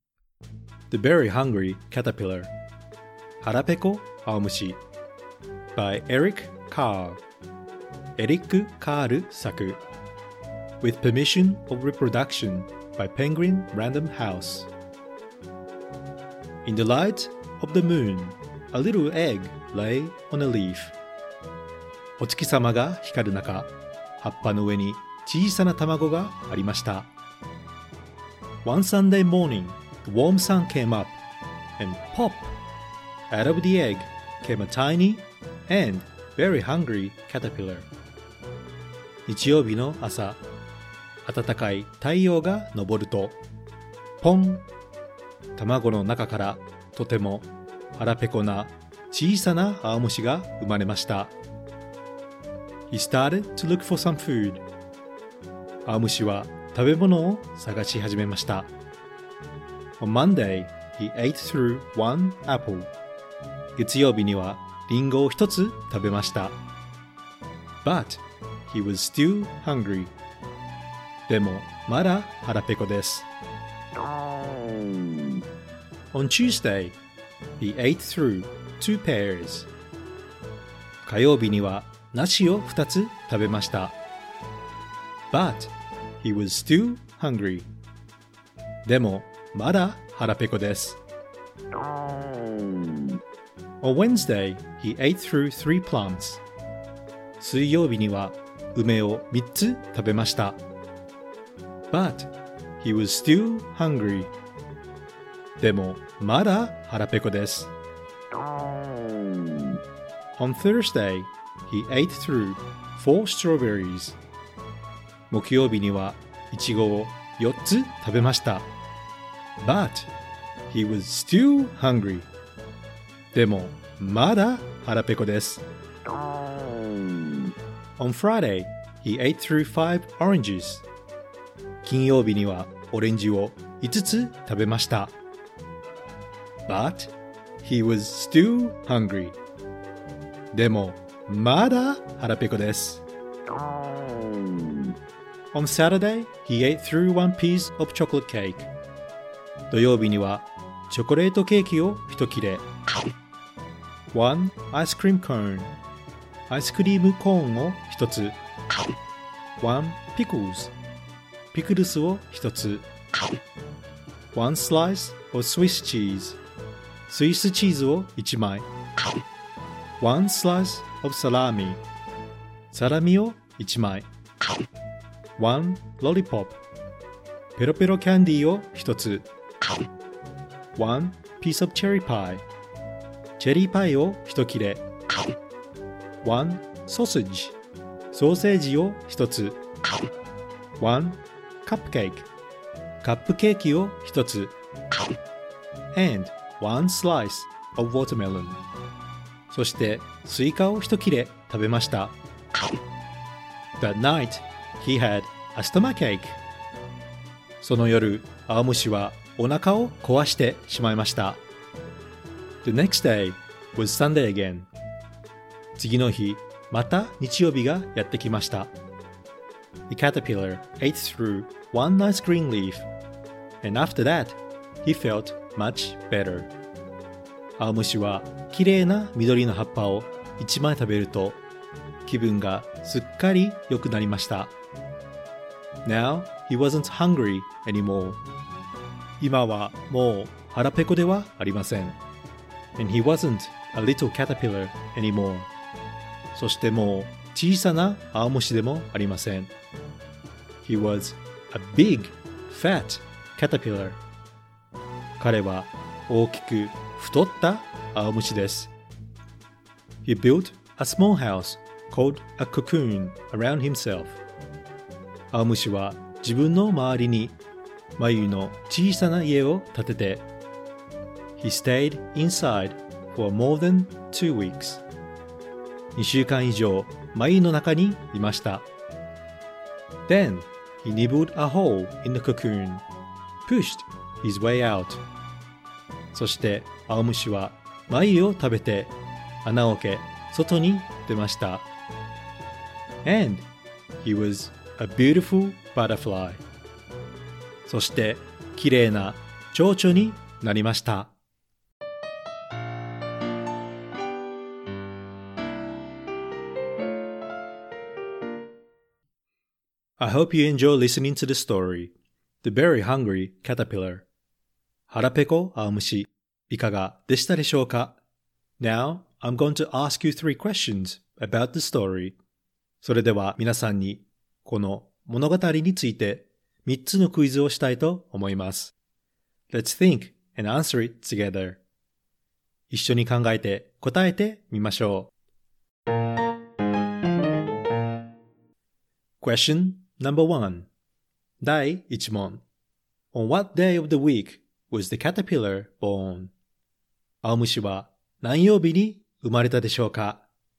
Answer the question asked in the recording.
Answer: The answer is, he was born... On Sunday.